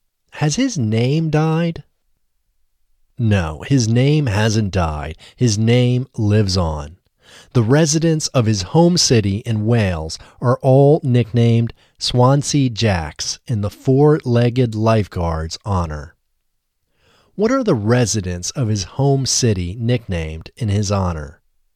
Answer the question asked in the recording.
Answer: The residents of his home city are all nicknamed Swansea Jacks.